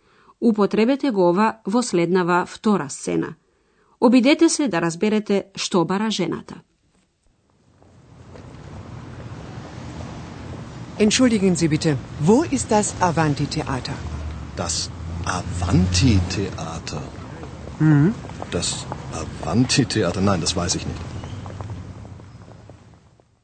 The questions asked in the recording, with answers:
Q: Обидете се да разберете што бара жената.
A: Та го бара театарот Аванти.